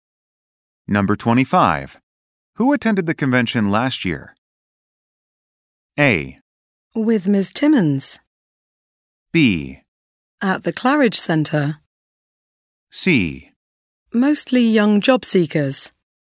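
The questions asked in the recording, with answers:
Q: Who attended the convention last year?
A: C: Mostly young job seekers.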